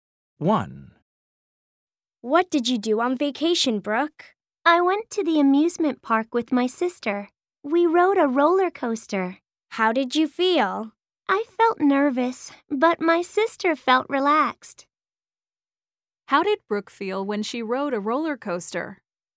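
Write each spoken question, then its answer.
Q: How did Brooke feel when she rode a roller coaster?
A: nervous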